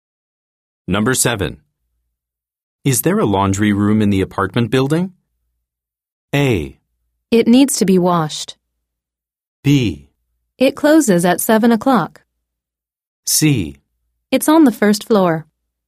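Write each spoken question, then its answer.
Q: Is there a laundry room in the apartment building?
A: C: It's on the first floor.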